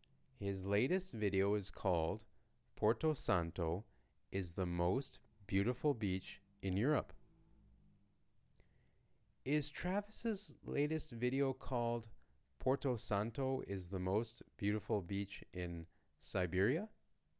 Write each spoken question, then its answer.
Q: Is Travis's latest video called Porto Santo is the most beautiful beach in Siberia?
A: No, it's called Porto Santo is the most beautiful beach in Europe.